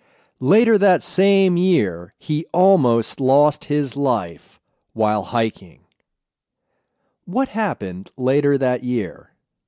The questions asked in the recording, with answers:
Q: What happened later that year?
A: Later that year, he almost lost his life while hiking.